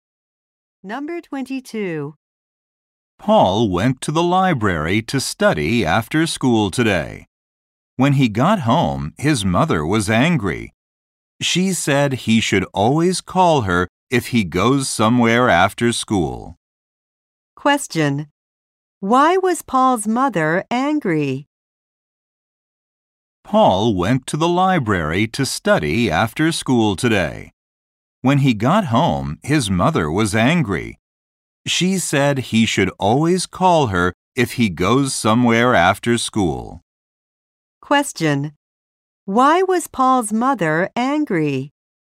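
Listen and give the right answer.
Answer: He didn't call her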